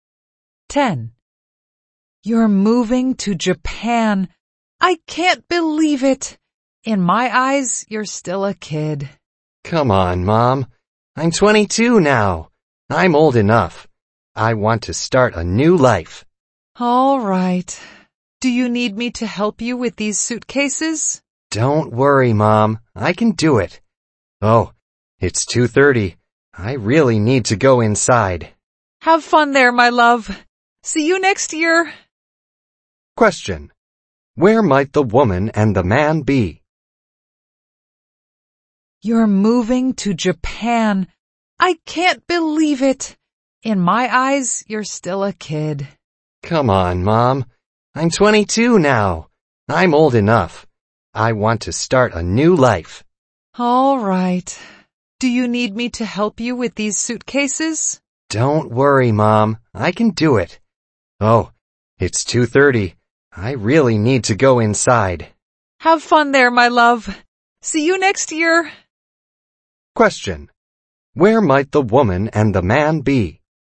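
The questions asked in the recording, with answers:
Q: Where might the woman and the man be?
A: At the airport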